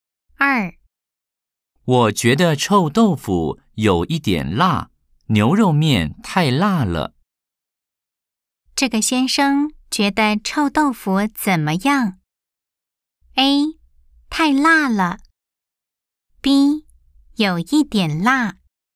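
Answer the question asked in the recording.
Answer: B: 有一点辣。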